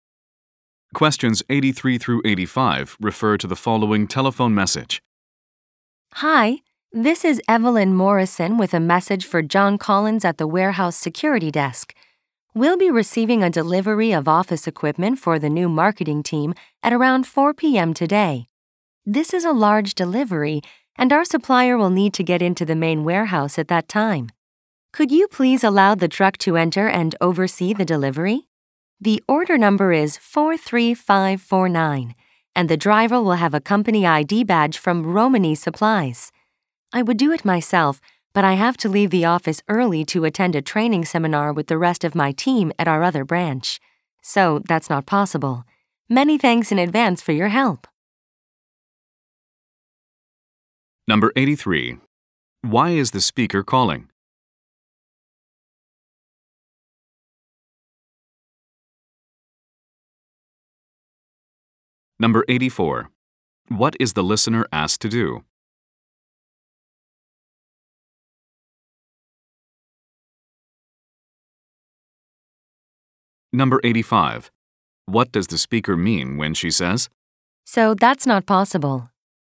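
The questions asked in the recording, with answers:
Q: Why is the speaker calling?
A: To arrange a delivery of office equipment

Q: What is the listener asked to do?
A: Let the truck in and oversee the delivery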